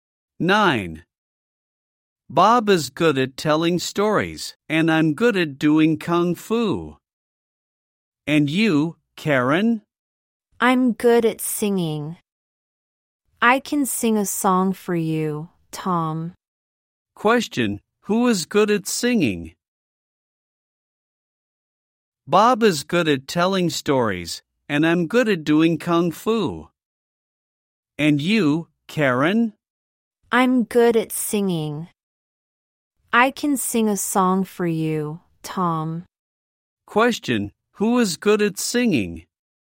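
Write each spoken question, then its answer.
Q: Question, who is good at singing?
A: Karen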